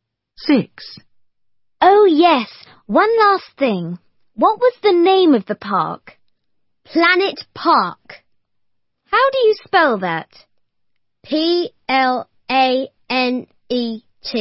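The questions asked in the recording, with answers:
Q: What was the name of the park?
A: Planet Park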